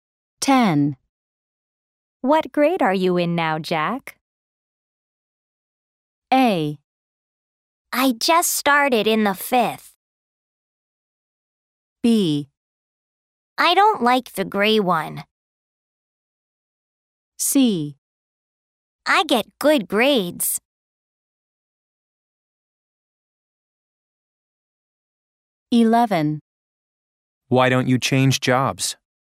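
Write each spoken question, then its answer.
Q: What grade are you in now, Jack?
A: A: I just started in the fifth.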